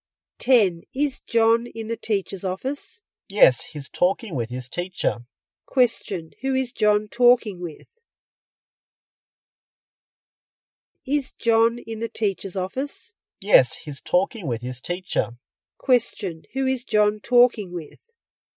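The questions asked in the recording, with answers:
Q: Question, who is John talking with?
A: His teacher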